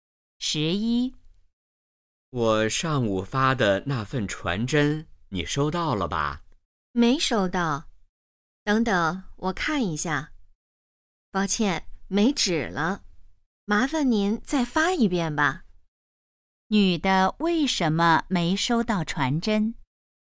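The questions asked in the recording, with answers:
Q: 女的为什么没收到传真?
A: 传真机没纸了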